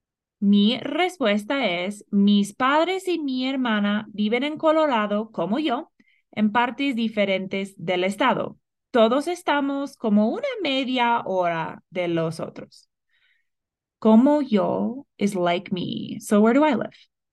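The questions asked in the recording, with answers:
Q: So where do I live?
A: In Colorado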